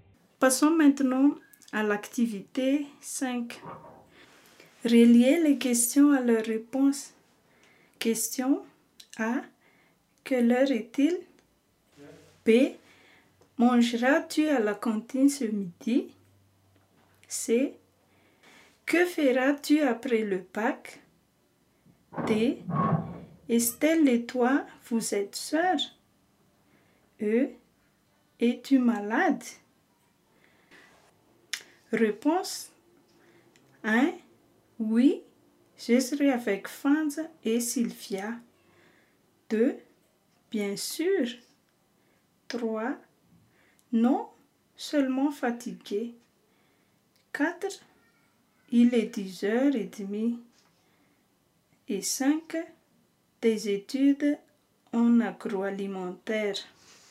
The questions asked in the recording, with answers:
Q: Quelle heure est-il?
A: 3. Il est 10h30.

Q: Mangeras-tu à la cantine ce midi?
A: Oui, ce serait avec Fanz et Sylvia.

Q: Que feras-tu après le bac?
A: Relis à la réponse 5. Des études en agroalimentaire.

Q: Estelle et toi, vous êtes sœurs?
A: Relis à la réponse bien sûr.

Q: Es-tu malade?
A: Relis à la réponse, non, seulement fatiguée.